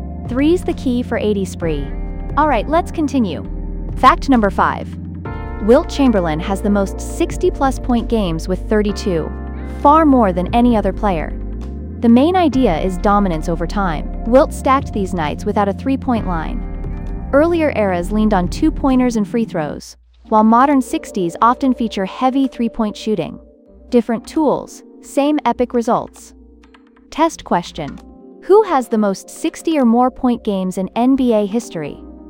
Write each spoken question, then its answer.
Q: Who has the most 60 or more point games in NBA history?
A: Correct answer. Wilt Chamberlain.